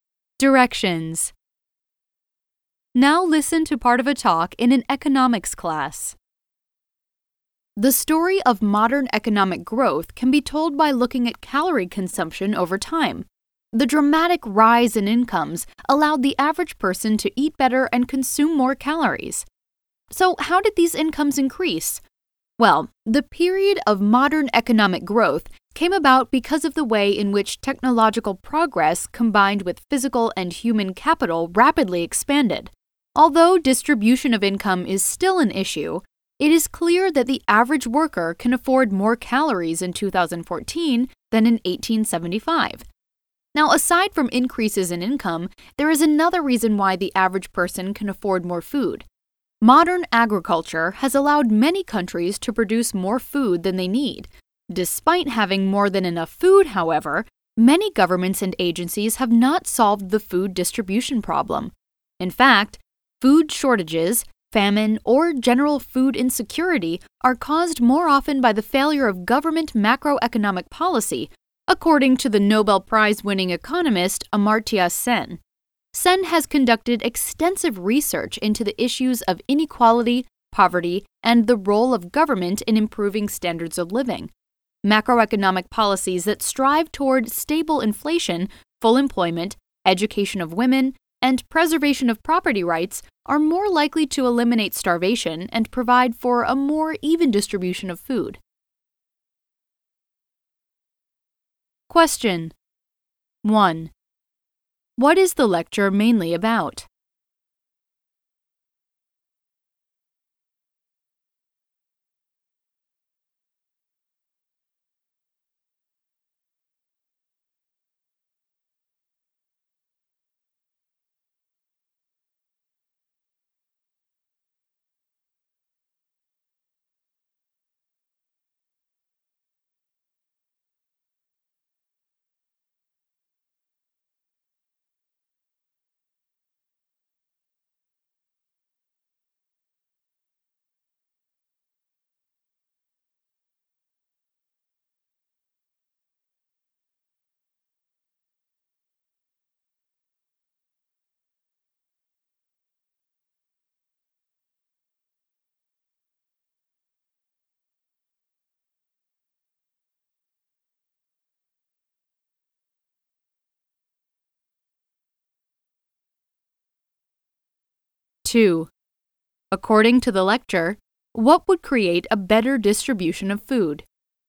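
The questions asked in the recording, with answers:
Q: According to the lecture, what would create a better distribution of food?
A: Government macroeconomic policies aimed at stable inflation, full employment, education of women and protecting property rights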